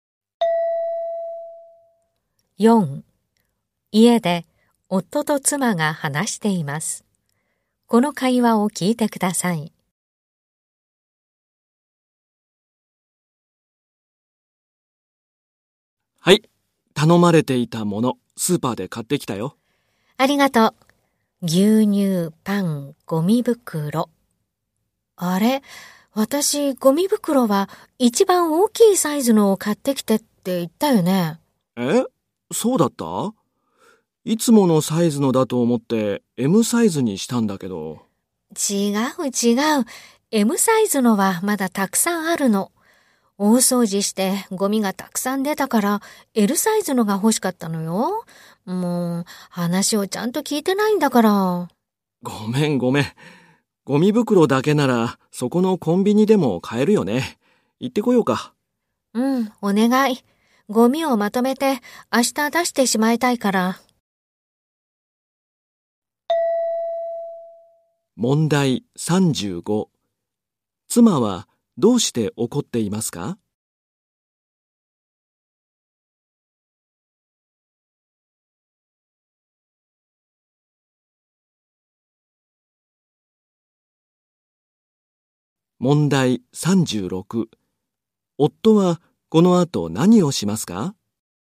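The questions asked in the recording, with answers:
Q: 妻はどうして怒っていますか?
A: 夫がLサイズではなくMサイズのゴミ袋を買ってきたから

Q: 夫はこの後何をしますか?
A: コンビニへLサイズのゴミ袋を買いに行く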